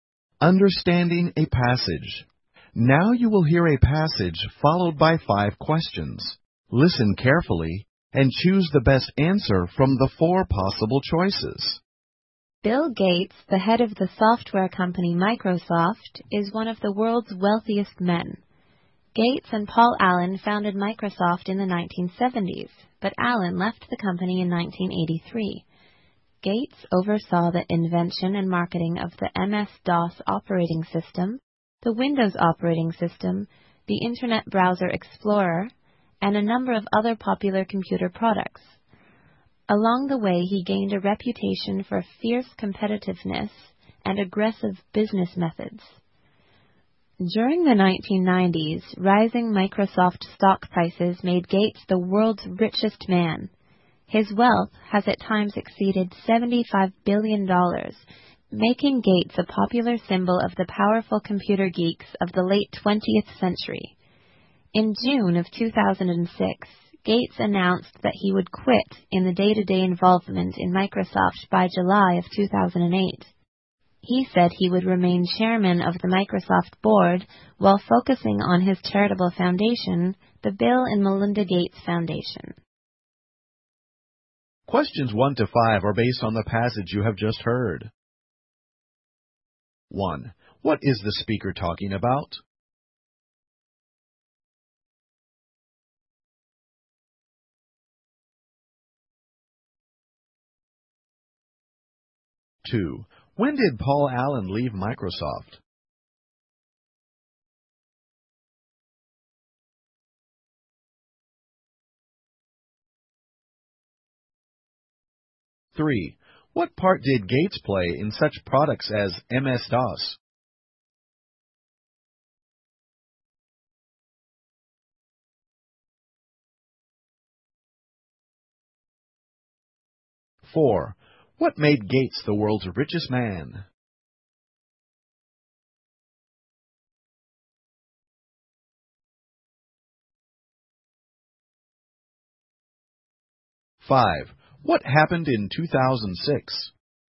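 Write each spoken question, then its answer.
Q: What is the speaker talking about?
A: Bill Gates

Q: When did Paul Allen leave Microsoft?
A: In 1983

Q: What part did Gates play in such products as MS-DOS?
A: He oversaw their invention and marketing

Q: What made Gates the world's richest man?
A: Rising Microsoft stock prices

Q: What happened in 2006?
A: Gates announced he would quit day-to-day involvement in Microsoft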